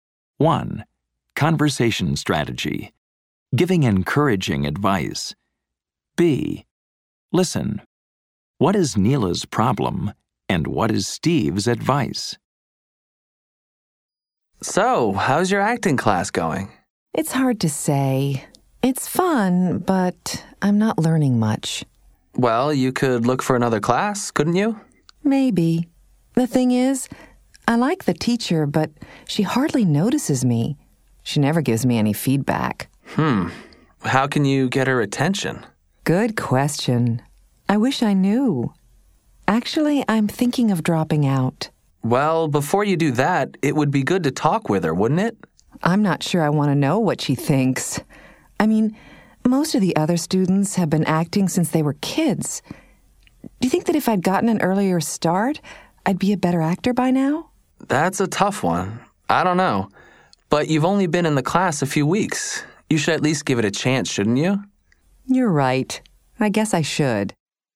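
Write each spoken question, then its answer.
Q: What is Neela's problem and what is Steve's advice?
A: Her acting teacher hardly notices her or gives feedback and she's thinking of dropping out; Steve advises her to talk with the teacher and give the class a chance.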